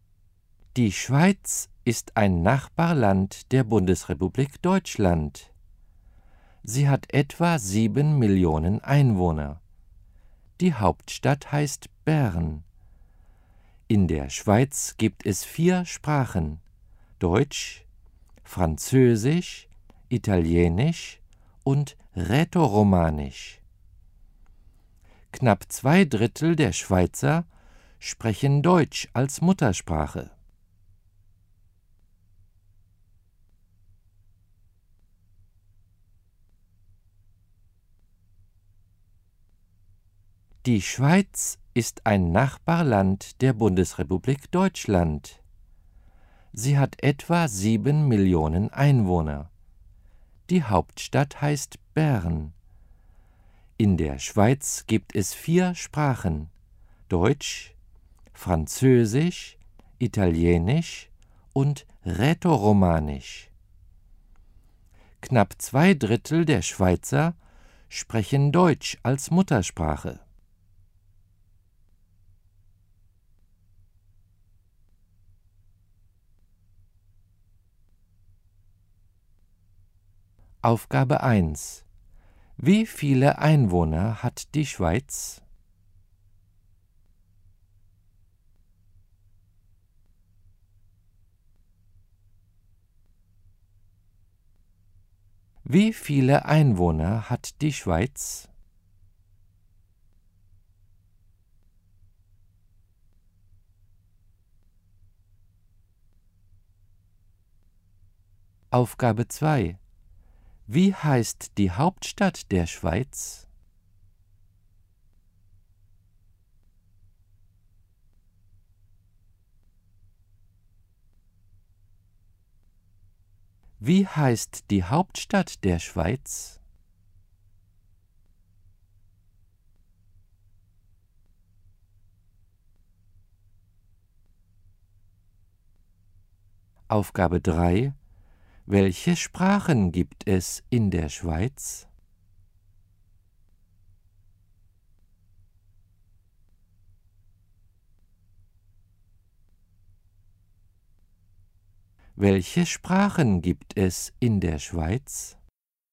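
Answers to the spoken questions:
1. Etwa 7 Millionen
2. Bern
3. Deutsch, Französisch, Italienisch und Rätoromanisch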